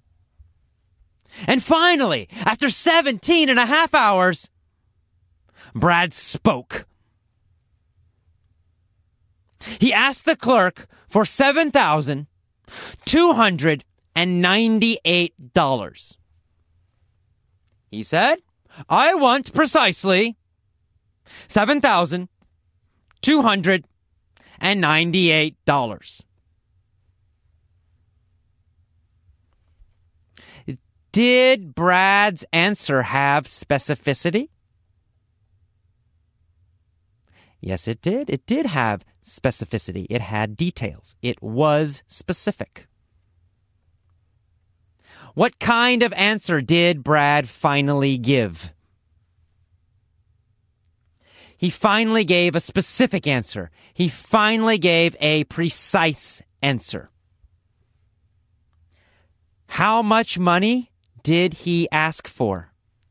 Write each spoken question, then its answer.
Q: How much money did he ask for?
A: He asked for